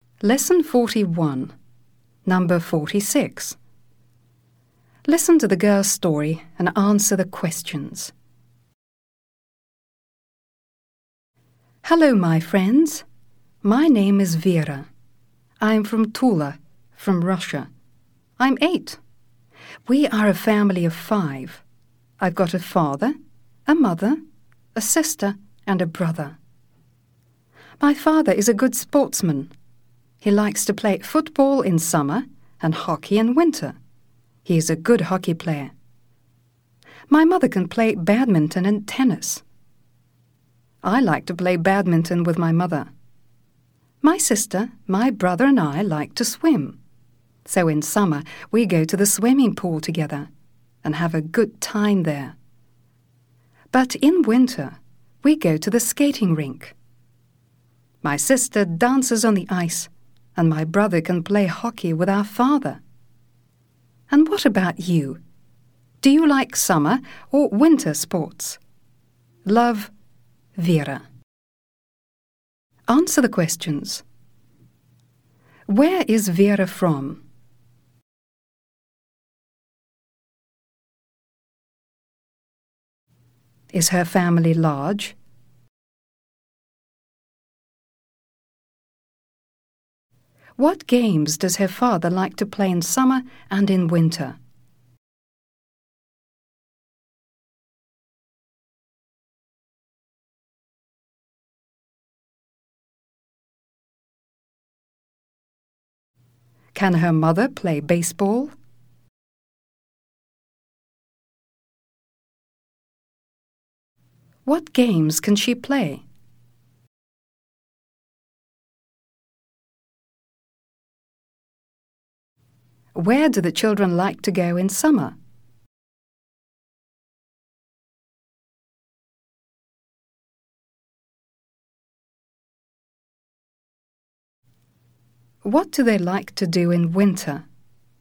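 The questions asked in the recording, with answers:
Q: Where is Vera from?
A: From Tula, Russia

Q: What games does her father like to play in summer and in winter?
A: Football in summer and hockey in winter

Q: Can her mother play baseball?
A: No

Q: What games can she play?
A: Badminton and tennis

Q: Where do the children like to go in summer?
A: To the swimming pool

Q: What do they like to do in winter?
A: Go to the skating rink: the sister dances on the ice, the brother plays hockey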